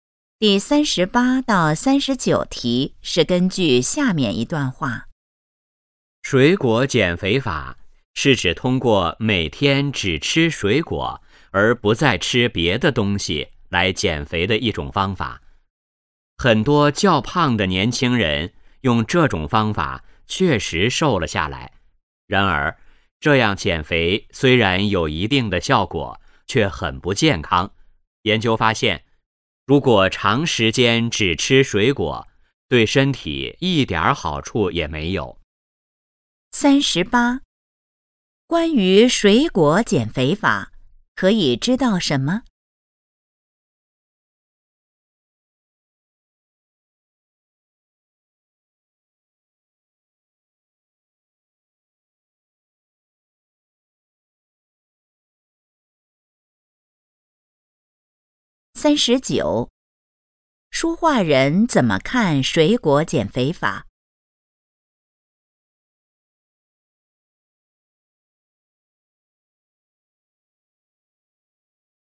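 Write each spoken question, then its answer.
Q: 书画人怎么看水果减肥法?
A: 不健康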